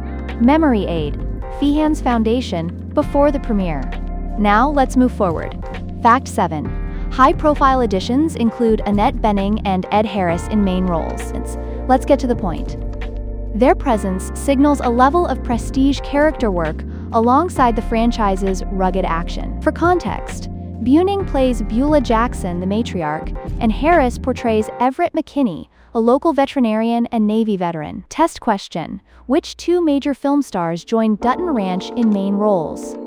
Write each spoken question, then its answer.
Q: Which 2 major film stars joined Dutton Ranch in main roles?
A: Correct answer. Annette Bening and Ed Harris.